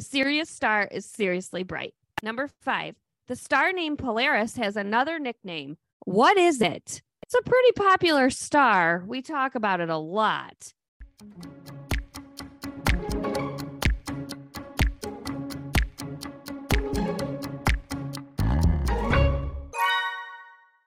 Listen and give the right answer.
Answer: That's the North Star guiding our way.